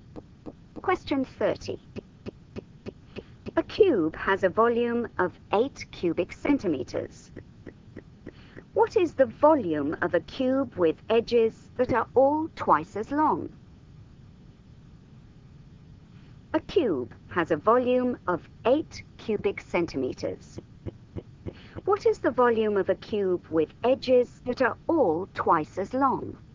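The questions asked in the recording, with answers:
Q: What is the volume of a cube with edges that are all twice as long?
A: 64 cubic centimeters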